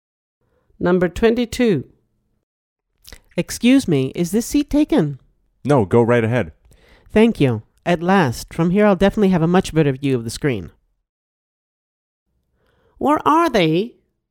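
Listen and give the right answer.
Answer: at the cinema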